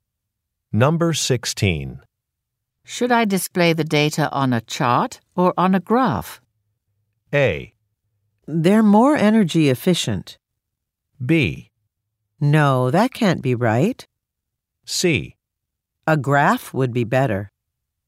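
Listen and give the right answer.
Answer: C: A graph would be better.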